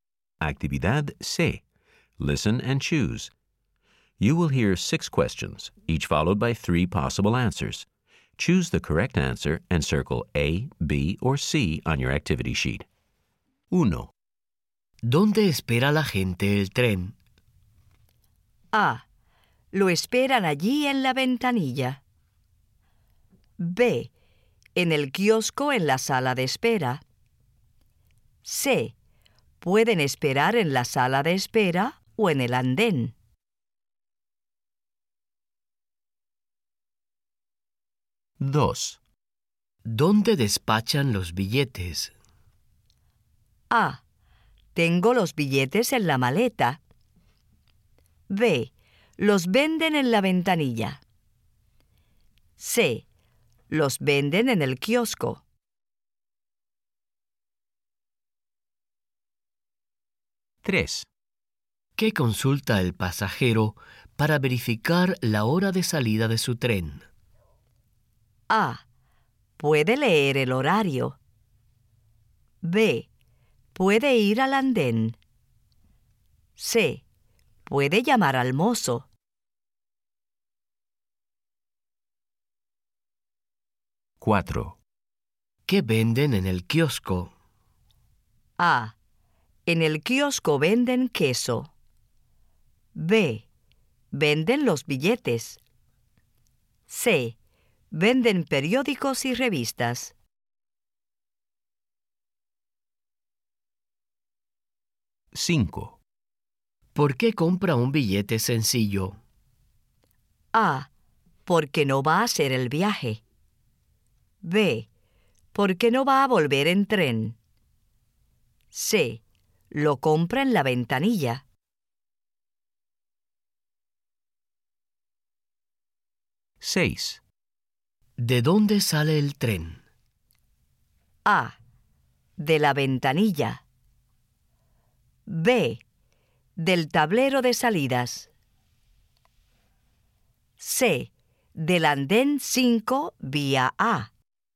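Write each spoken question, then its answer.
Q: ¿Dónde espera la gente el tren?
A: C: Pueden esperar en la sala de espera o en el andén.

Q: ¿Dónde despachan los billetes?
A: B: Los venden en la ventanilla.

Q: ¿Qué consulta el pasajero para verificar la hora de salida de su tren?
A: A: Puede leer el horario.

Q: ¿Qué venden en el kiosco?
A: C: Venden periódicos y revistas.

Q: ¿Por qué compra un billete sencillo?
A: B: Porque no va a volver en tren.

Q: ¿De dónde sale el tren?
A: C: Del andén 5 vía A.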